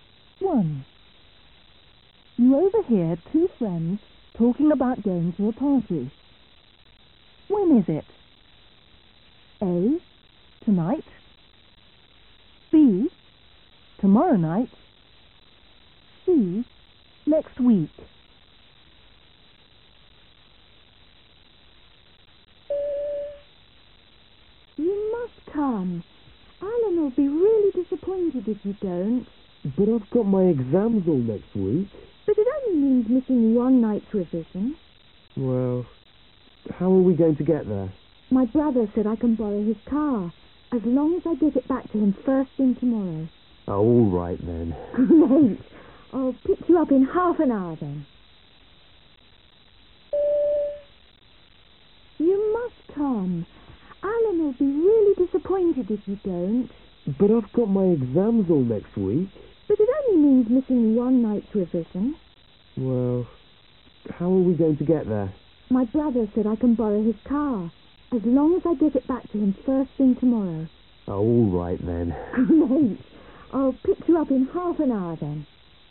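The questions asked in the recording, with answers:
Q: When is it? A, tonight. B, tomorrow night. Next week.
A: A: tonight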